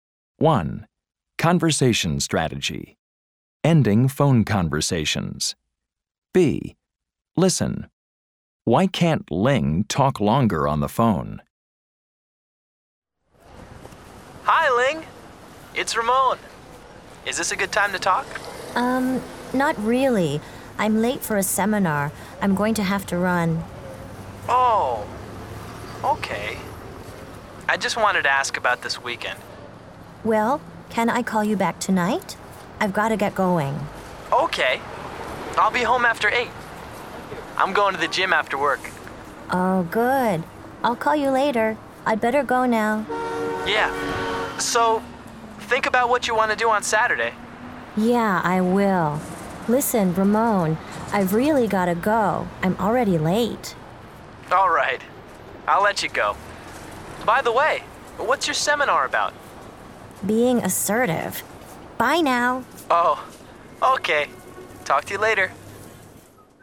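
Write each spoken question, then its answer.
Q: Why can't Ling talk longer on the phone?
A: She's late for a seminar.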